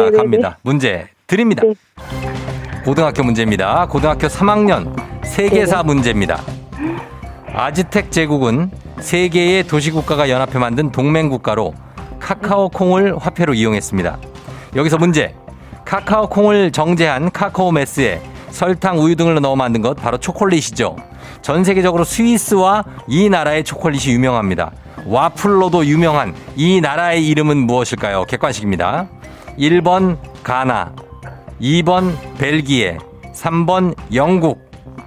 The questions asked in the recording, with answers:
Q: 와플로도 유명한 이 나라의 이름은 무엇일까요? 객관식입니다. 1번 가나, 2번 벨기에, 3번 영국.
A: 2번 벨기에? 정답입니다.